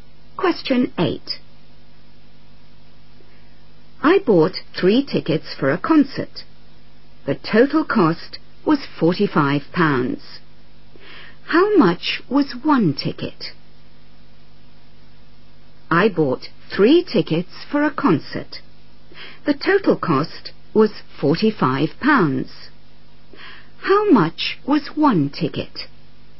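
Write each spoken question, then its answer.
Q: The total cost was £45. How much was 1 ticket?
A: £15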